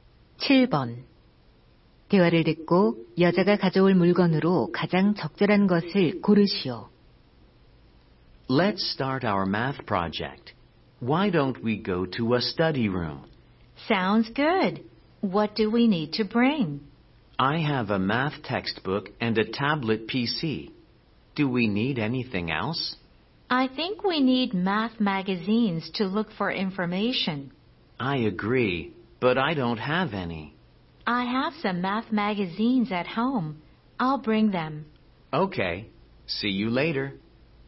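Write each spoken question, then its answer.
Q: 대화를 듣고 여자가 가져올 물건으로 가장 적절한 것을 고르시오.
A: 수학 잡지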